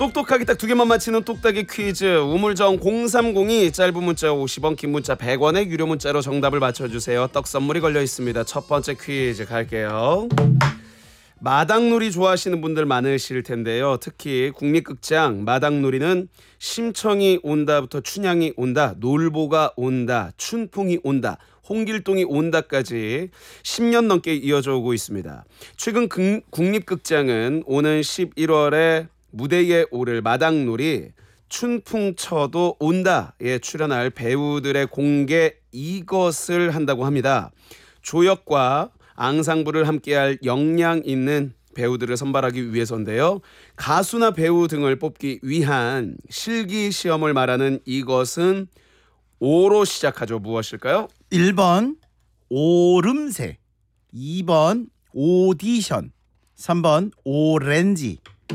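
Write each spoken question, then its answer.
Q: 가수나 배우 등을 뽑기 위한 실기시험을 말하는 이것은 오로 시작하죠. 무엇일까요?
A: 2번: 오디션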